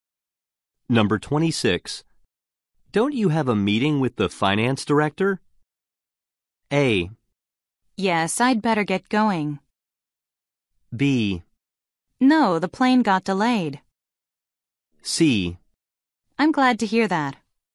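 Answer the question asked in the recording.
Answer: A: Yes, I'd better get going.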